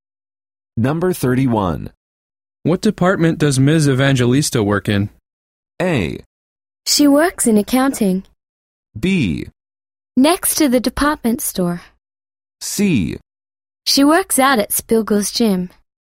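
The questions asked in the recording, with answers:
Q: What department does Ms. Evangelista work in?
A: A: She works in accounting.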